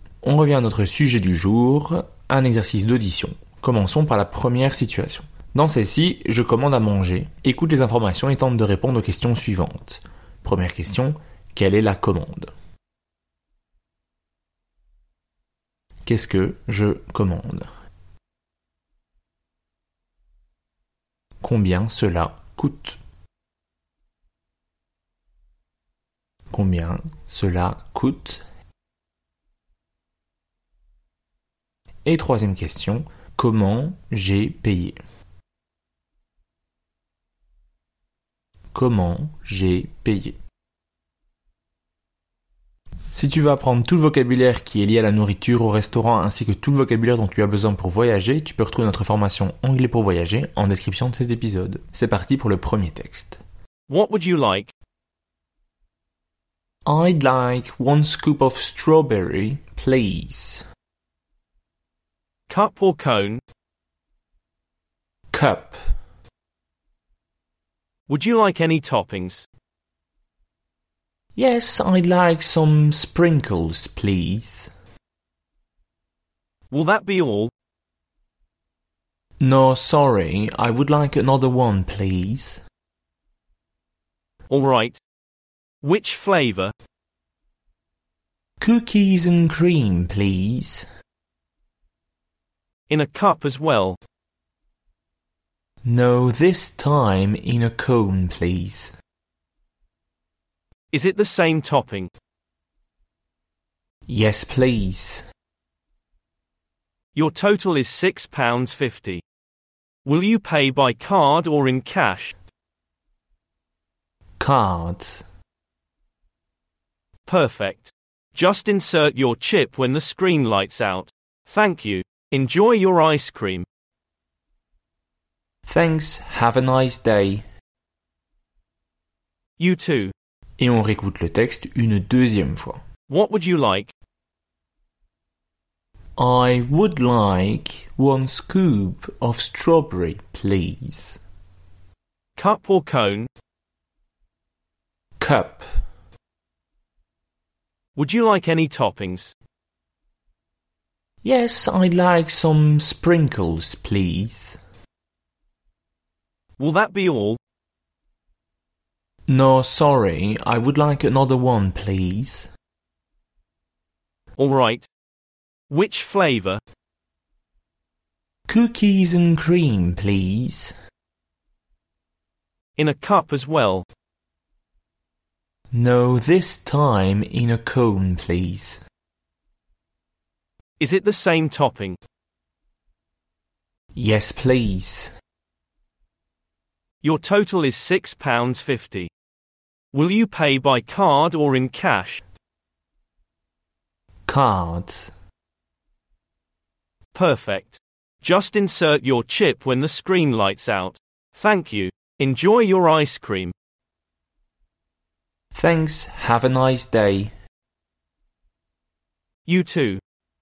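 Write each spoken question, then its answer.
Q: Première question, quelle est la commande ?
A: Deux glaces : une boule fraise en pot avec des vermicelles, et une cookies and cream en cornet avec des vermicelles

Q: Combien cela coûte ?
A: 6,50 £

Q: Et troisième question, comment j'ai payé ?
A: Par carte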